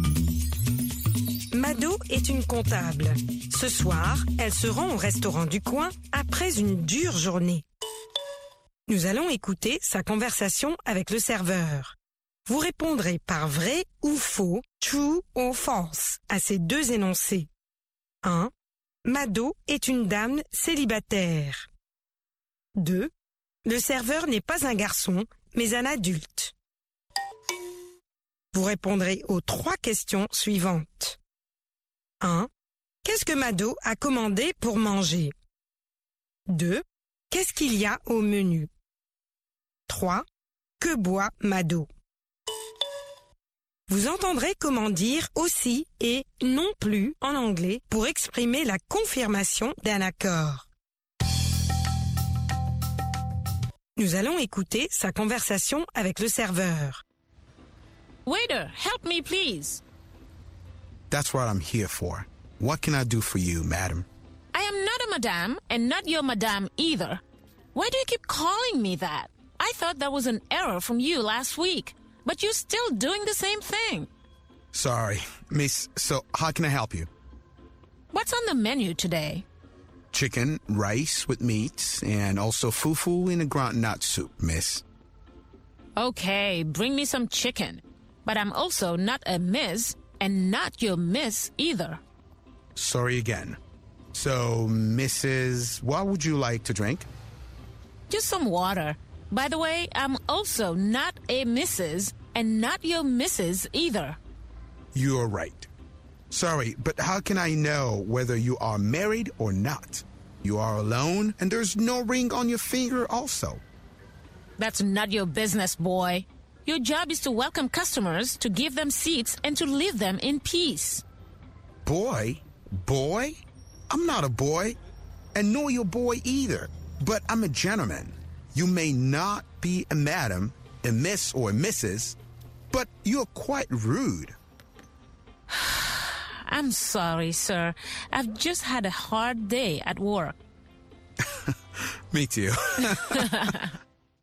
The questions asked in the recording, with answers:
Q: Le serveur n'est pas un garçon, mais un adulte.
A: L'énoncé 2 est vrai. Le serveur n'est pas un garçon, mais un adulte.

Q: Qu'est-ce que Mado a commandé pour manger?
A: Elle a commandé du poulet.

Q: Qu'est-ce qu'il y a au menu?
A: Du poulet, du riz, de la viande et du foufou.

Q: Que boit Mado?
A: De l'eau.